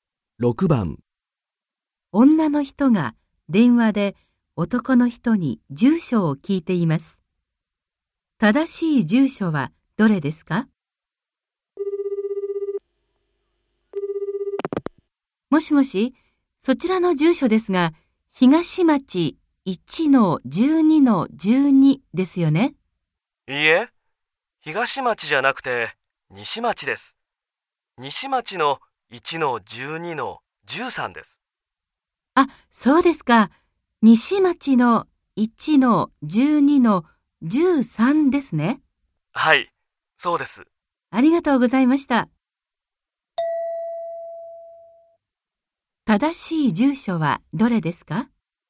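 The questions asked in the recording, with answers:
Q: 正しい住所はどれですか?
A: 西町1-12-13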